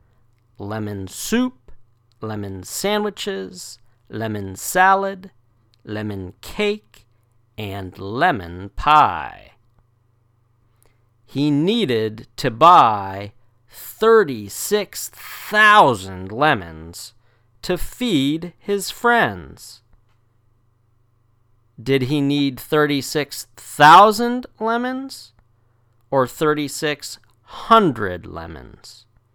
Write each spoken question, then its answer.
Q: Did he need 36,000 lemons or 3,600 lemons?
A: 36,000. He needed to buy 36,000 lemons.